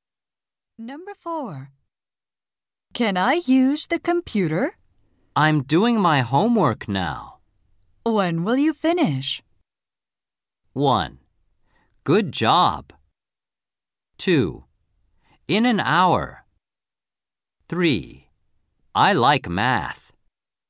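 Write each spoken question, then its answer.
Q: When will you finish?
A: 2: In an hour.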